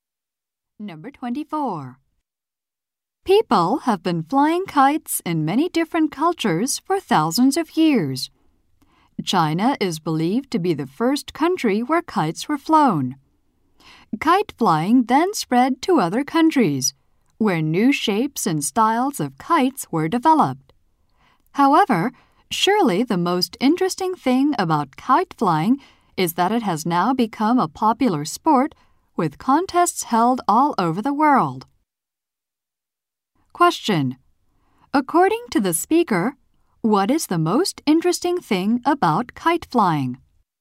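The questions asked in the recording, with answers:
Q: According to the speaker, what is the most interesting thing about kite flying?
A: It has become a popular sport with contests worldwide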